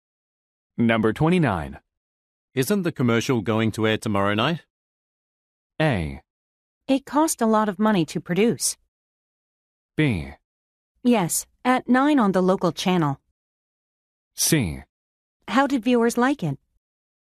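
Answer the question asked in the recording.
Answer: B: Yes, at 9 on the local channel.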